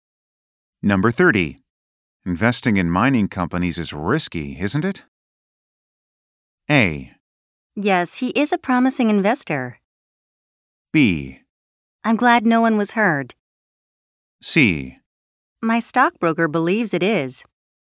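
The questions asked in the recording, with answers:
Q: Investing in mining companies is risky, isn't it?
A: C: My stockbroker believes it is.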